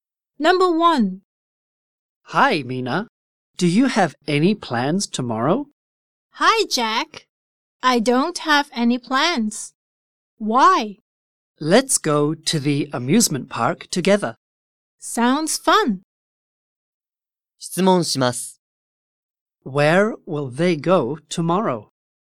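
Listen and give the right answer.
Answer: To the amusement park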